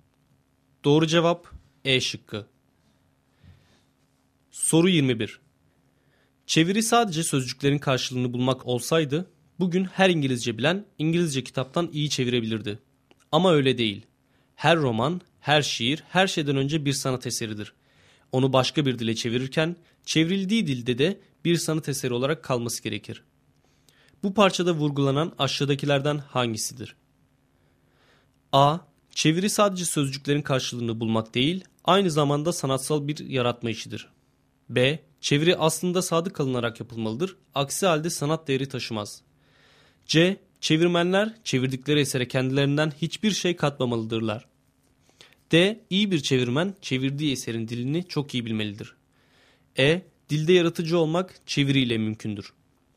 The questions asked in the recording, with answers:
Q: Bu parçada vurgulanan aşağıdakilerden hangisidir?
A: Doğru cevap A şıkkı.